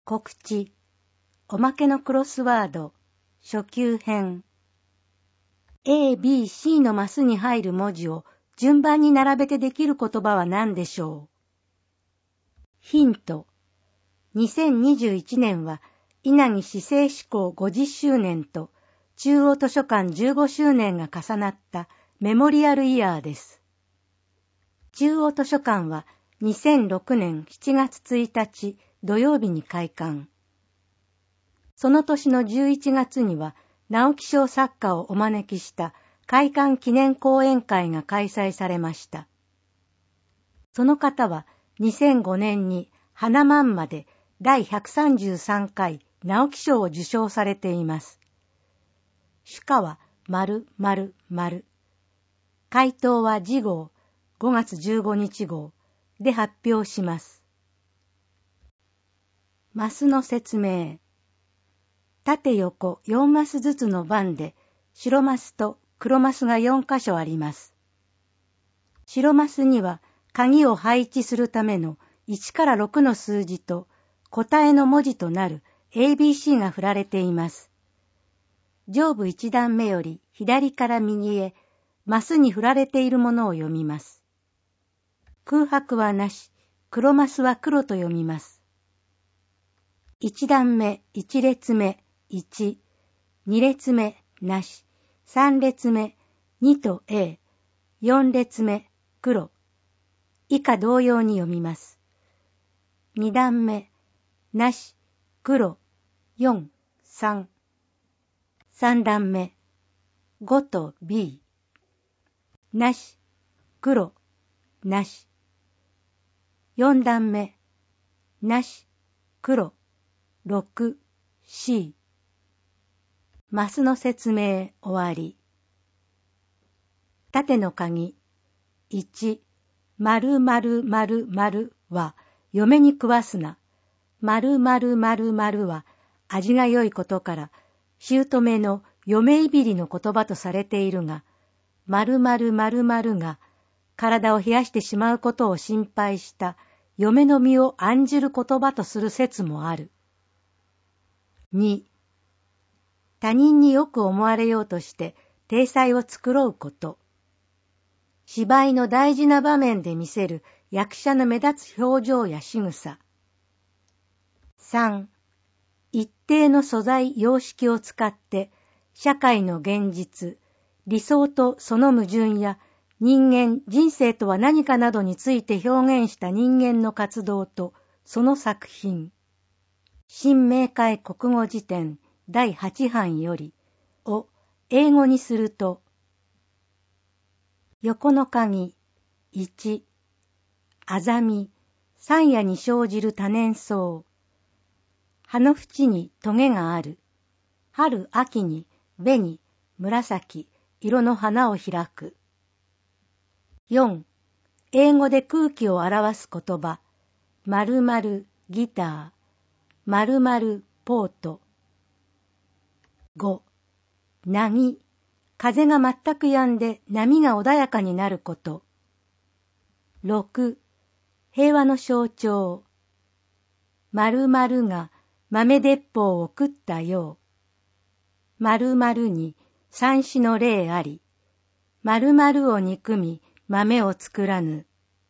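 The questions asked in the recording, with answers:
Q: A、B、C のマスに入る文字を順番に並べてできる言葉は何でしょう?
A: ミナト(湊)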